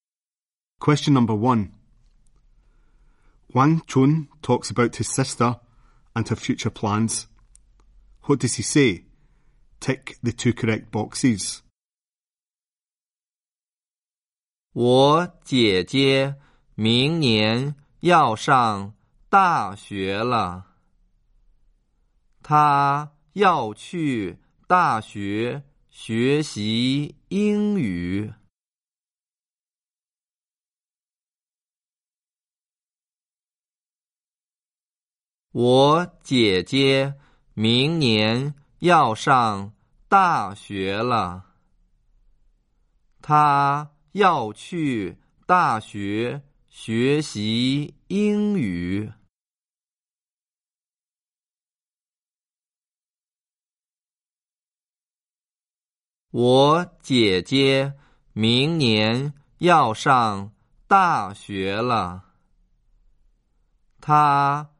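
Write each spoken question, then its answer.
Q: What does he say? Tick the two correct boxes.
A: His sister will go to university next year and will study English there.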